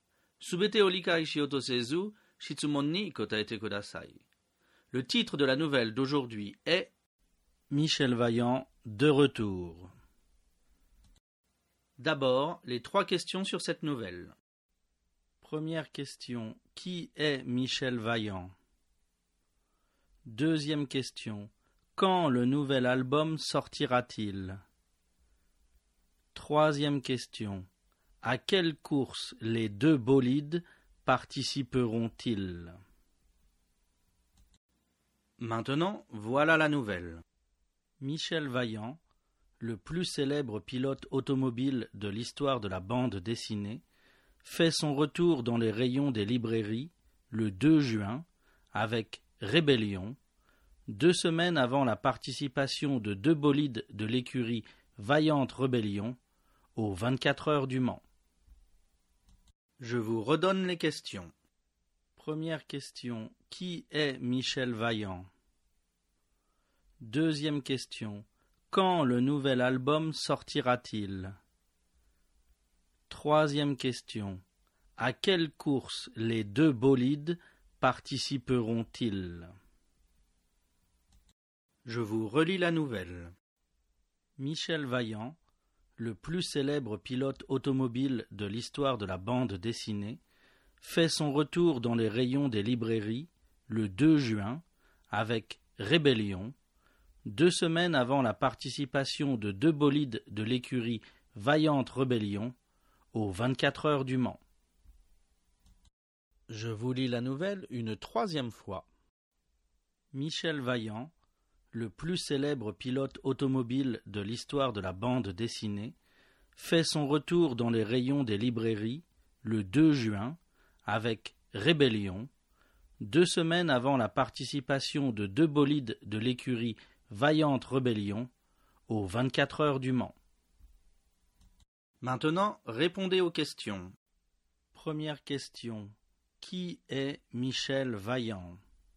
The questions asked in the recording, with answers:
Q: Première question, qui est Michel Vaillant?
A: Réponse, Michel Vaillant est le plus célèbre pilote automobile de l'histoire de la bande dessinée.

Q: Deuxième question, quand le nouvel album sortira-t-il?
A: Réponse, le nouvel album sortira le 2 juin.

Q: Troisième question, à quelle course les deux bolides participeront-ils?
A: Réponse. Les deux bolides participeront aux 24 heures du Mans.